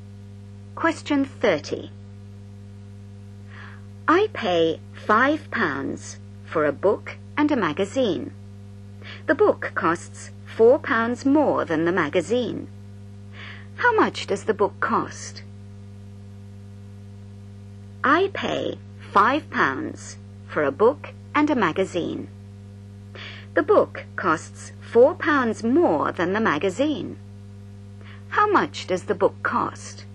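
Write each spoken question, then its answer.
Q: How much does the book cost?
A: £4.50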